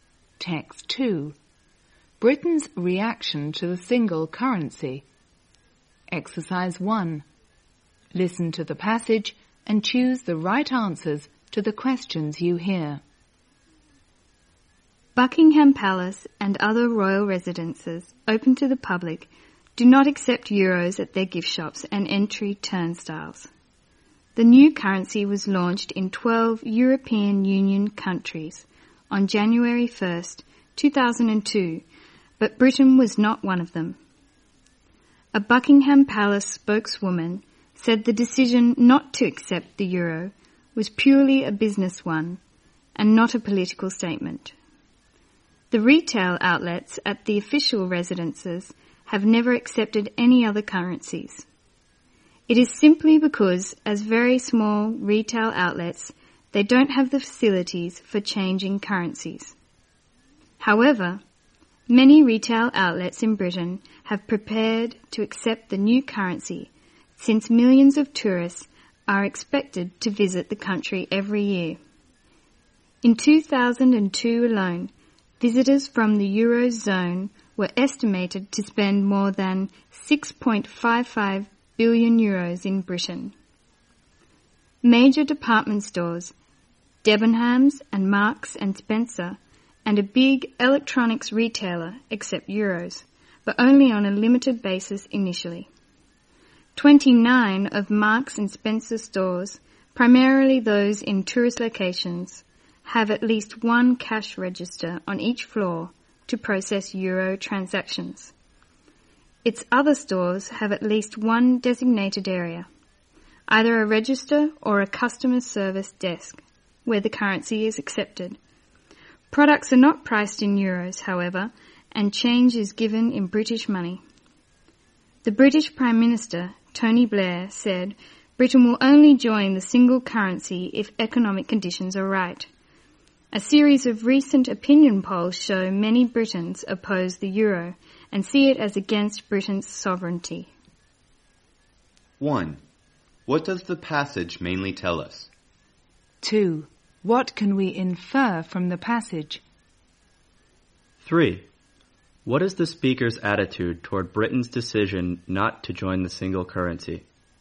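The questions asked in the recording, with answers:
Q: What does the passage mainly tell us?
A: How Britain reacted to the euro: royal residences do not accept it, some shops accept it in a limited way, and many Britons oppose it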